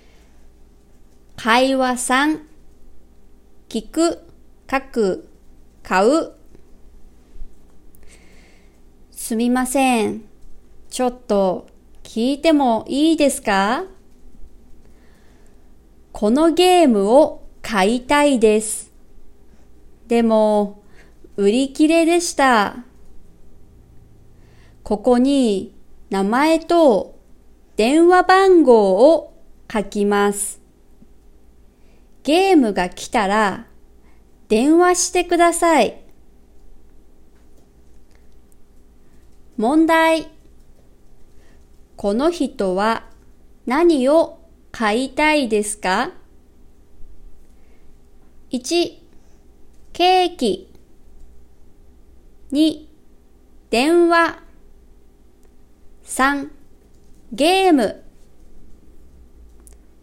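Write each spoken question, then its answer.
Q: この人は何を買いたいですか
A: 3: ゲーム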